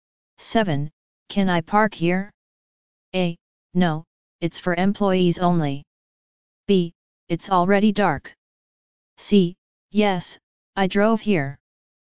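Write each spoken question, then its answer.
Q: Can I park here?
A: A: No, it's for employees only.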